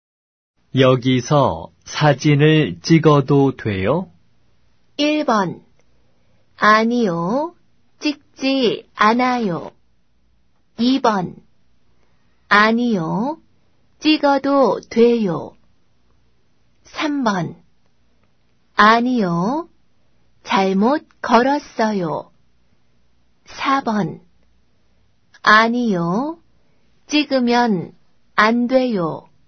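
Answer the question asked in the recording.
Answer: 4: 아니요. 찍으면 안 돼요.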